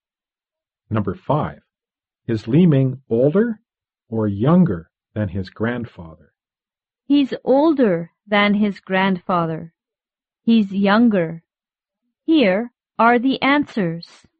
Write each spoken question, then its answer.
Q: Is Li Ming older or younger than his grandfather?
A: Li Ming is younger than his grandfather.